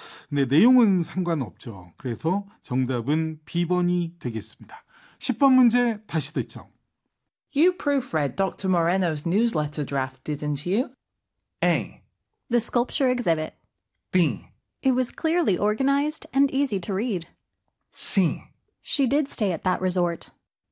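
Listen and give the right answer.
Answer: B: It was clearly organized and easy to read.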